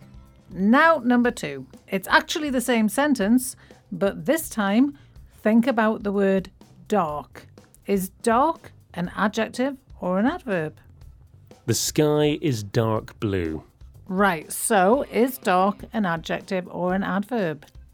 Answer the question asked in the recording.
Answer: Dark here is an adverb.